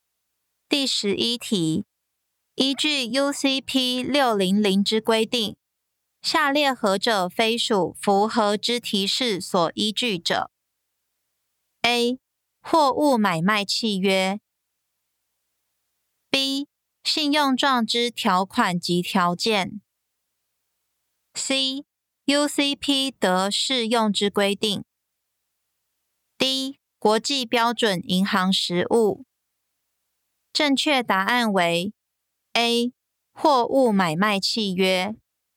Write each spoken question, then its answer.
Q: 依据 UCP 600之规定,下列何者非属符合之提示所依据者 ?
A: 正确答案为 A. 货物买卖契约。